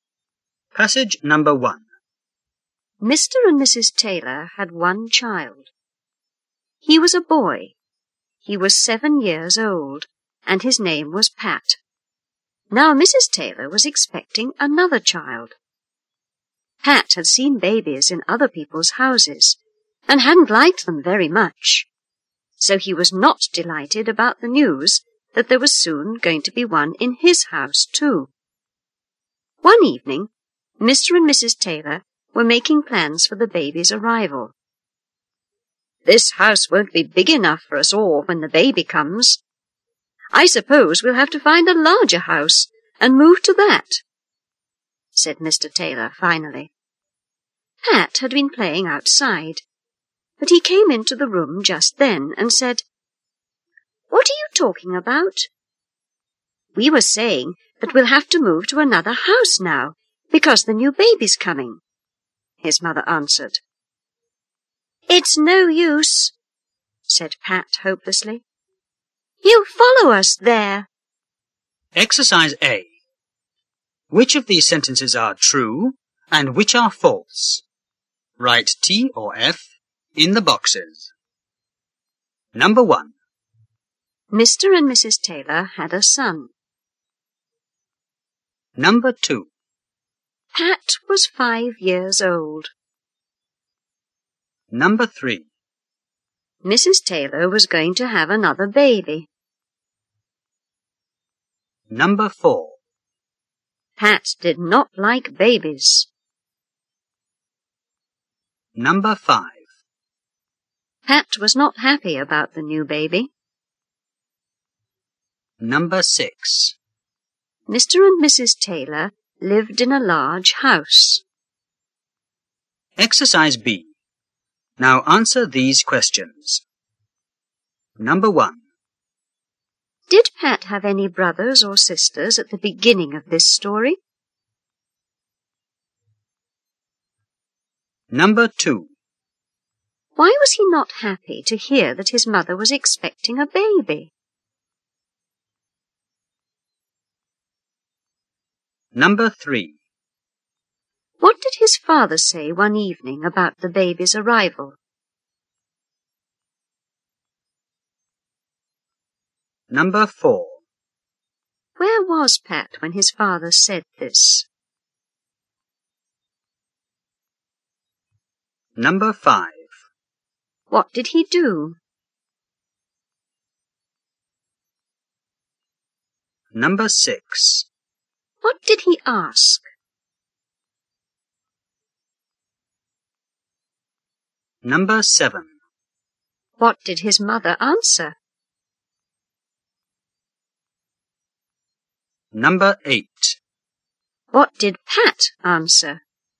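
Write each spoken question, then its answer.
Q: Mr. and Mrs. Taylor had a son.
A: True

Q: Pat was 5 years old.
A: False

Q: Mrs. Taylor was going to have another baby.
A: True

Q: Pat did not like babies.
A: True

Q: Pat was not happy about the new baby.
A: True

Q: Mr. and Mrs. Taylor lived in a large house.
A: False

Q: Did Pat have any brothers or sisters at the beginning of this story?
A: No, he was their only child.

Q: Why was he not happy to hear that his mother was expecting a baby?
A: He had seen babies in other people's houses and hadn't liked them very much.

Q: What did his father say one evening about the baby's arrival?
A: That the house wouldn't be big enough, so they would have to find a larger house and move.

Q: Where was Pat when his father said this?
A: Playing outside.

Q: What did he do?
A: He came into the room.

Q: What did he ask?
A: What are you talking about?

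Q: What did his mother answer?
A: That they would have to move to another house because the new baby was coming.

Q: What did Pat answer?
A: It's no use, he'll follow us there.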